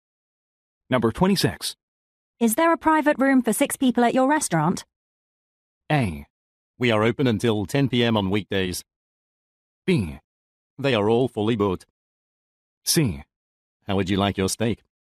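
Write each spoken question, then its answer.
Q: Is there a private room for 6 people at your restaurant?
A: B: They are all fully booked.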